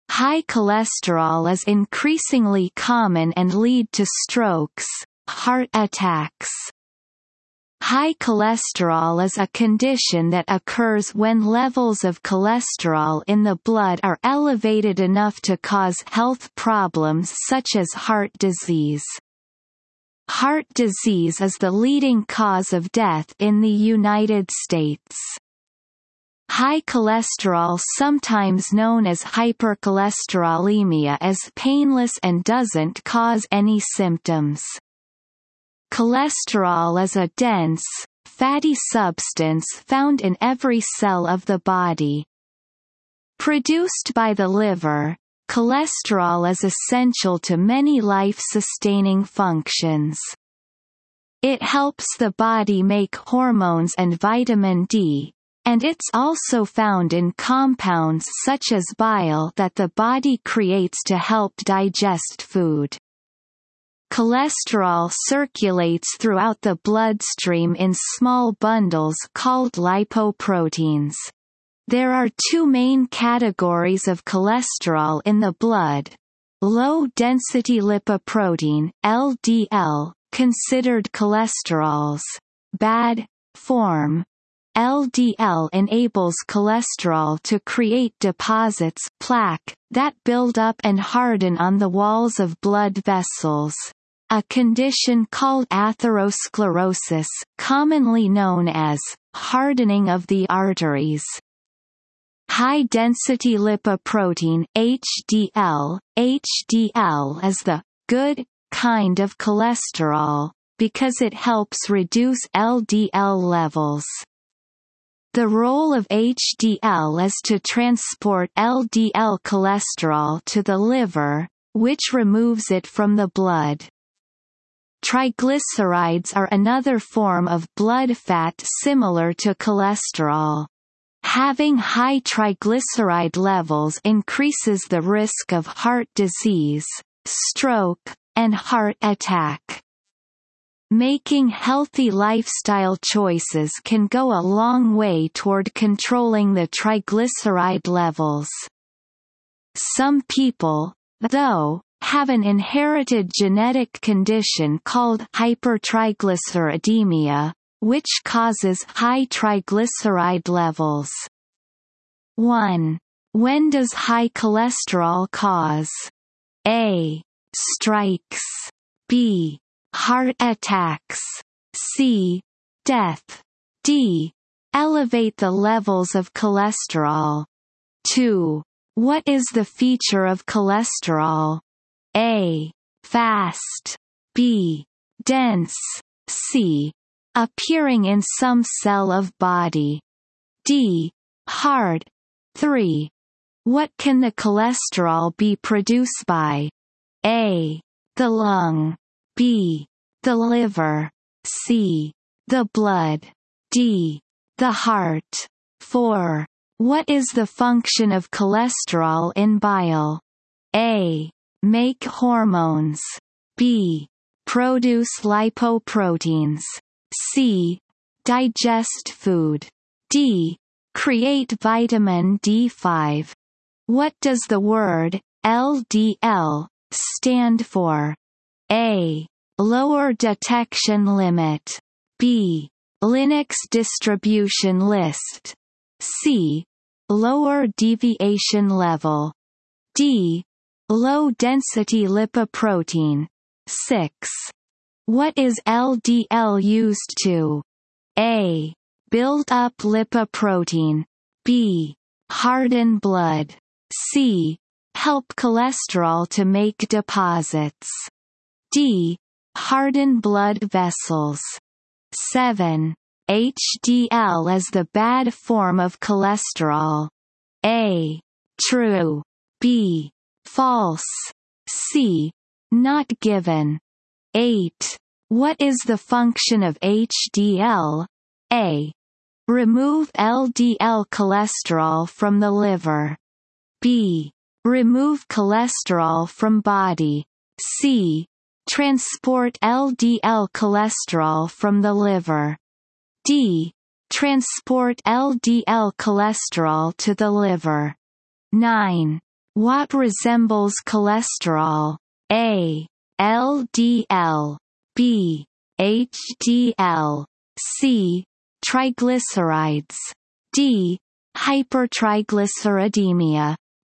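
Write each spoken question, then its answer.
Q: What is the feature of cholesterol?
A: B: Dense.

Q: What can the cholesterol be produced by?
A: B: The liver.

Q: What is the function of cholesterol in bile?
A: C: Digest food.

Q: What does the word LDL stand for?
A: D: Low-density lipoprotein.

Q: What is LDL used to?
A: C: Help cholesterol to make deposits.

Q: HDL is the bad form of cholesterol.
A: B: False.

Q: What is the function of HDL?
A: D: Transport LDL cholesterol to the liver.

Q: What resembles cholesterol?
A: C: Triglycerides.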